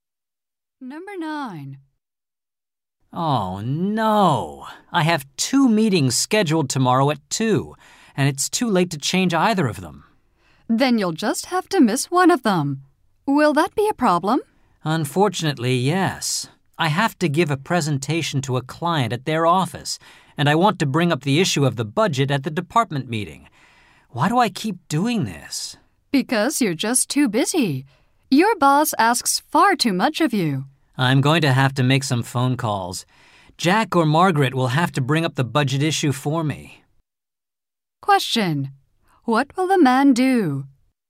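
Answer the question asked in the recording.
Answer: Give the client presentation and ask Jack or Margaret to raise the budget issue at the department meeting.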